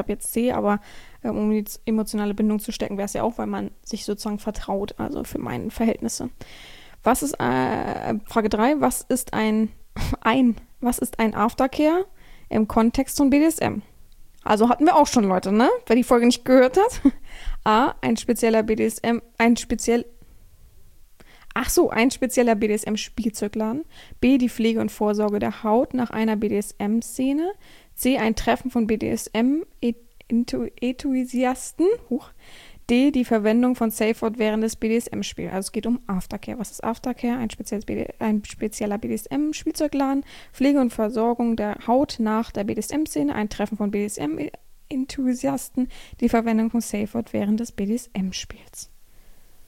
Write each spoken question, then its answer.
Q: was ist ein Aftercare im Kontext von BDSM?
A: Antwort 3, B, die Pflege und Versorgung der Haut nach einer BDSM-Szene, richtig.